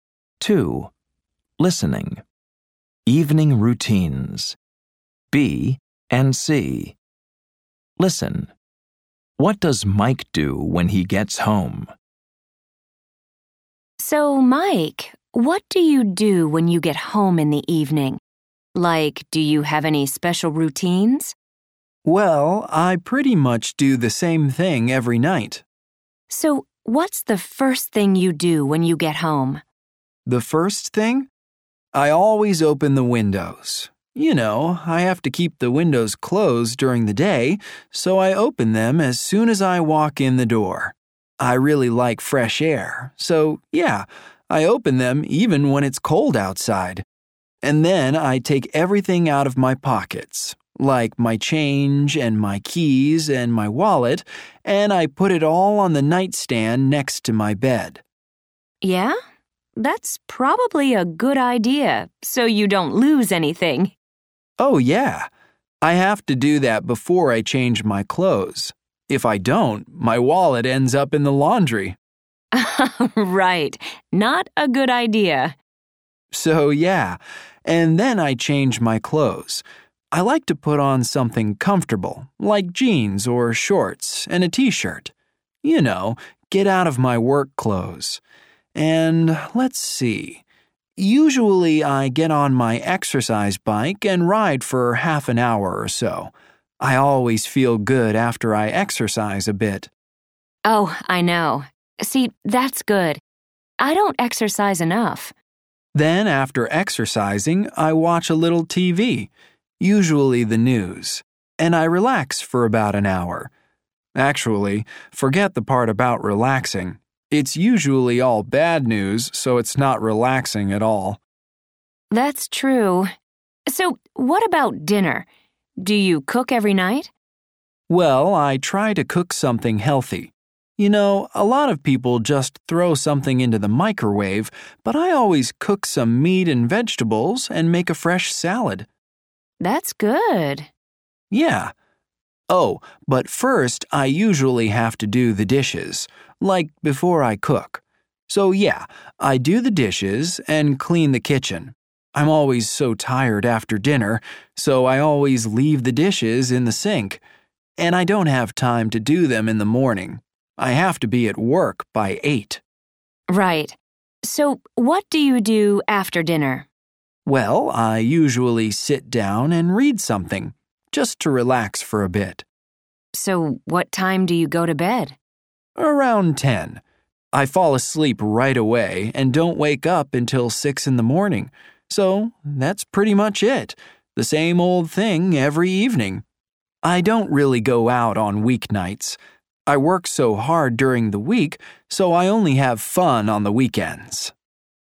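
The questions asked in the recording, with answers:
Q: What does Mike do when he gets home?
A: He opens the windows, empties his pockets, changes clothes, rides his exercise bike, watches TV, does the dishes, cooks dinner, reads, and goes to bed around 10.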